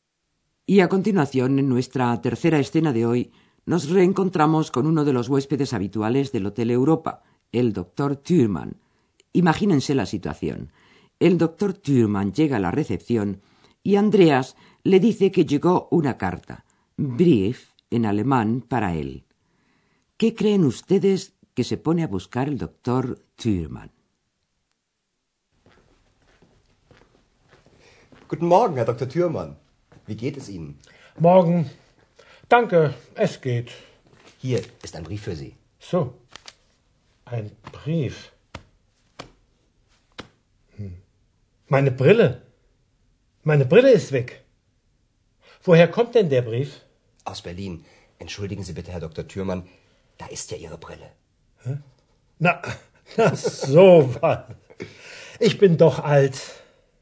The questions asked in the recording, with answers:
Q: ¿Qué creen ustedes que se pone a buscar el doctor Thürmann?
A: solo que para leerla necesita sus gafas, en alemán, Brille, y resulta que no las encuentra.